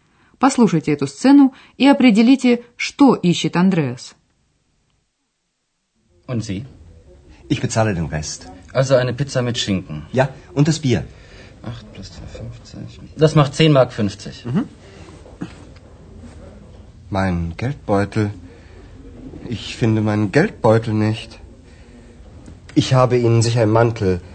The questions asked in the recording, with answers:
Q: Послушайте эту сцену и определите, что ищет Андреас.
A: Вы, конечно, поняли, чтобы заплатить нужны деньги, то есть кошелек.